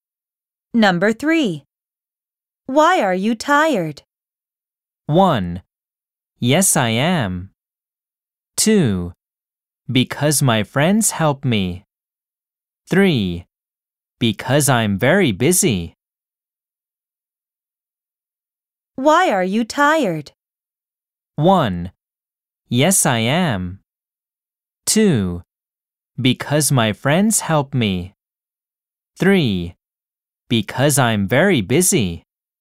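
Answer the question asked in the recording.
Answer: 3: Because I'm very busy.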